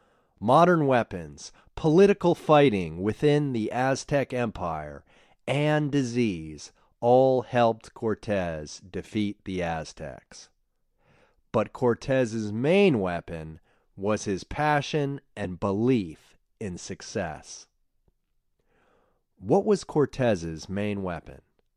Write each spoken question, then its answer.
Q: What was Cortez's main weapon?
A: Cortez's main weapon was his passion and his belief in success.